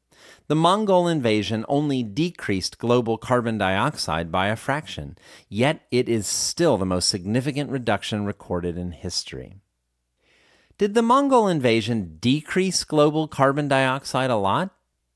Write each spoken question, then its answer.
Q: Did the Mongol invasion decrease global carbon dioxide a lot?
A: No, the Mongol invasion didn't decrease global carbon dioxide a lot.